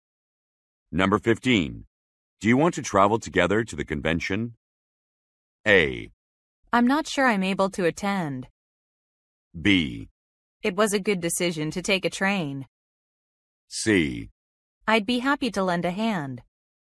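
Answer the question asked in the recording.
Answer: A: I'm not sure I'm able to attend.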